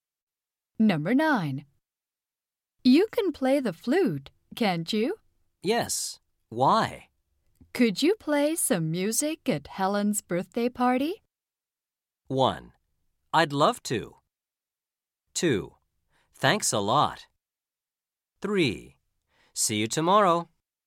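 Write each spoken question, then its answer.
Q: Could you play some music at Helen's birthday party?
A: 1: I'd love to.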